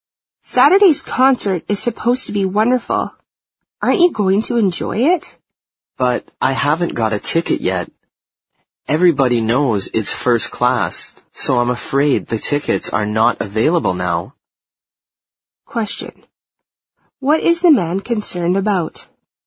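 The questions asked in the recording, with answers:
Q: What is the man concerned about?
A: That the concert tickets may already be sold out.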